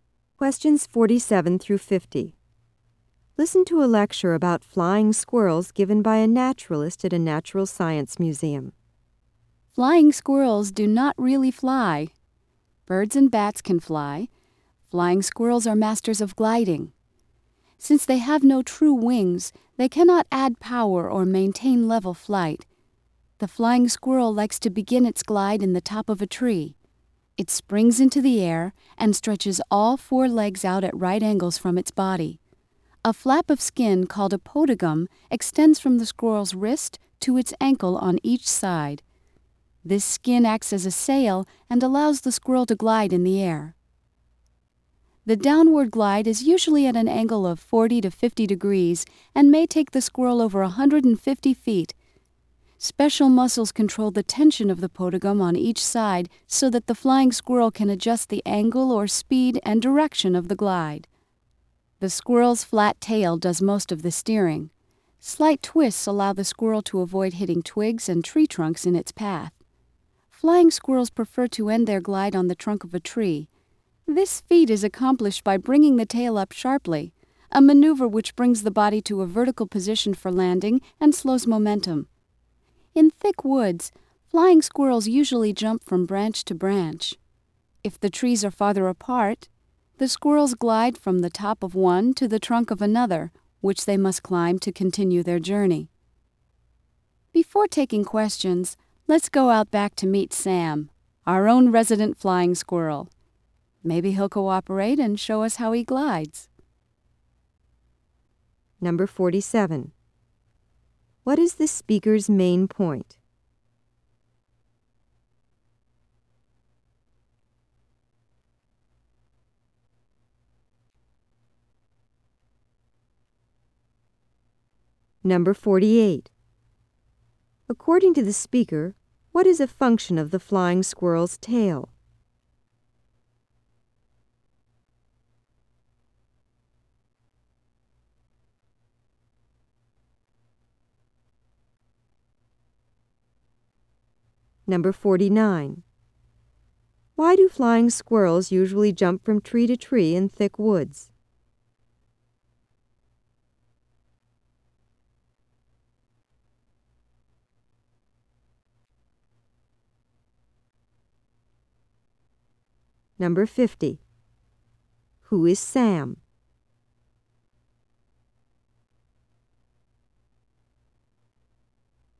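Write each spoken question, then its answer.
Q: What is the speaker's main point?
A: Flying squirrels glide rather than really fly

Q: According to the speaker, what is a function of the flying squirrel's tail?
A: Steering (and slowing down for landing)

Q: Who is Sam?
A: The museum's resident flying squirrel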